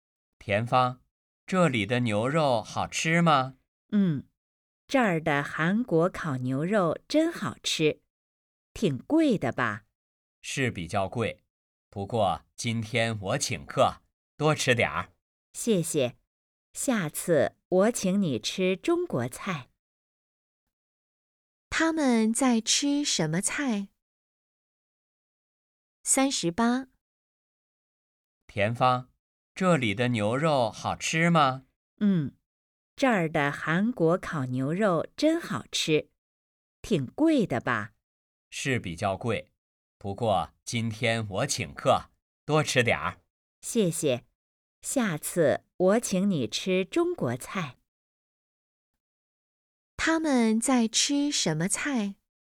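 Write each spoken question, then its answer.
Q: 他们在吃什么菜?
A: 韩国菜(烤牛肉)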